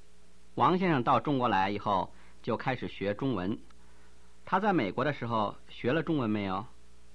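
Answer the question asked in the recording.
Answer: 没有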